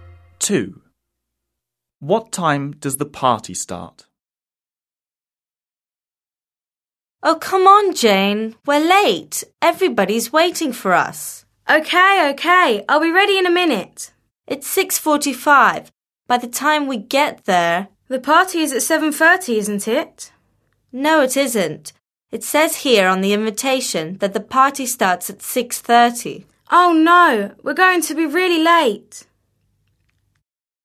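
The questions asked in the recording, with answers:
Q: What time does the party start?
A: 6:30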